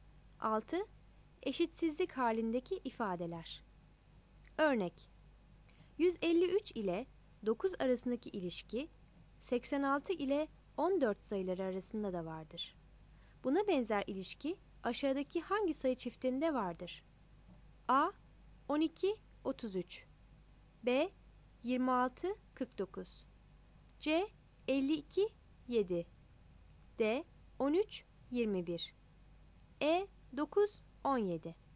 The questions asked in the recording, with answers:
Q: Buna benzer ilişki aşağıdaki hangi sayı çiftinde vardır?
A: Cevap C seçeneğidir.